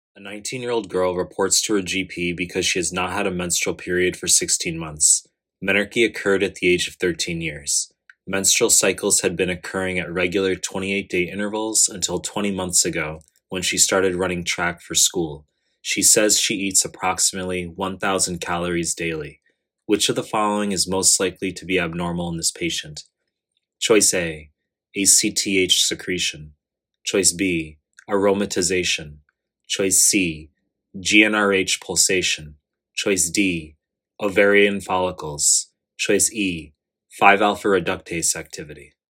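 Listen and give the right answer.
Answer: C: GnRH pulsation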